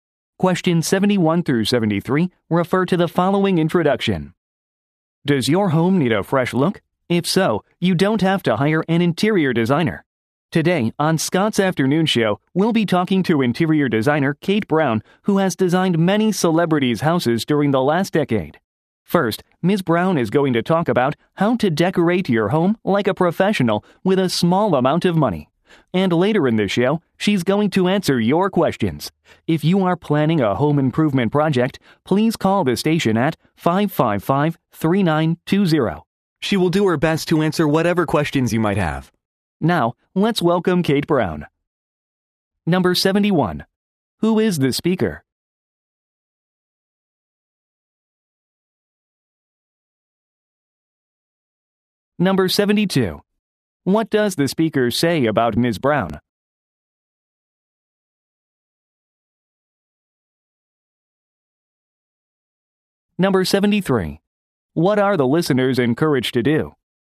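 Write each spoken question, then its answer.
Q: Who is the speaker?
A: A show host

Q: What does the speaker say about Ms. Brown?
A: She has designed many celebrities' houses

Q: What are the listeners encouraged to do?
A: Call the station with questions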